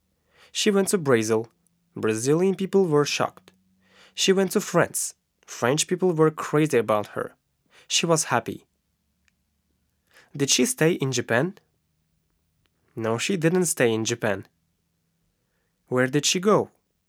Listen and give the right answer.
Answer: She went to Brazil.